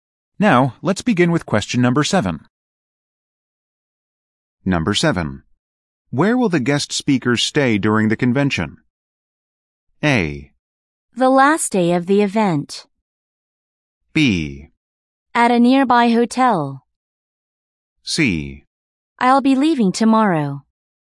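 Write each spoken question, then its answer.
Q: Where will the guest speakers stay during the convention?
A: B: At a nearby hotel.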